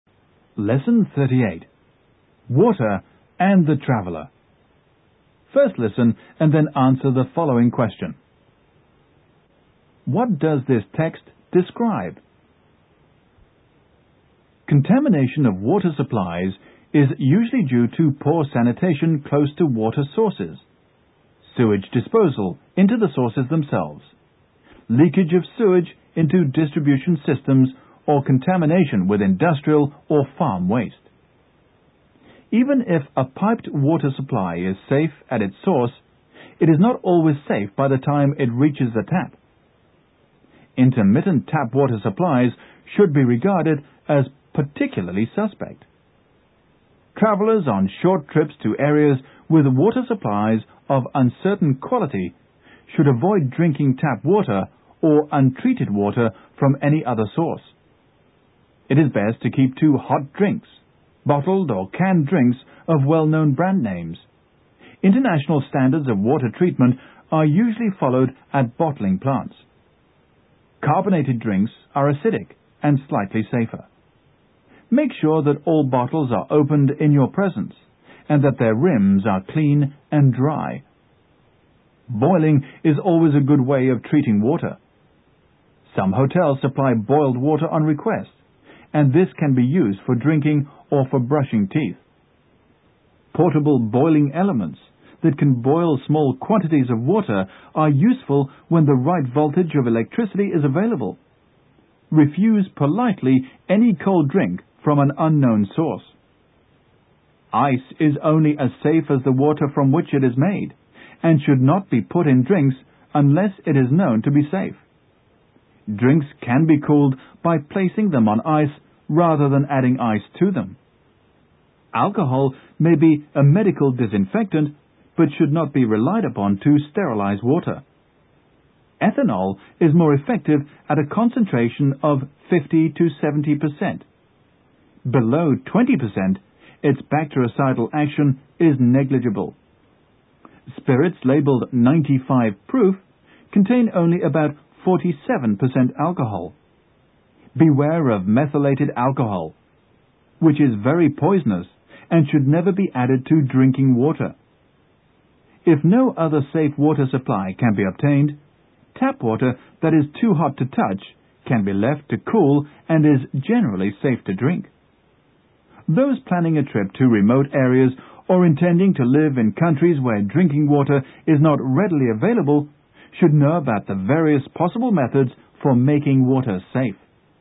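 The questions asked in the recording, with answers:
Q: What does this text describe?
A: Water contamination and how travellers can make sure their drinking water is safe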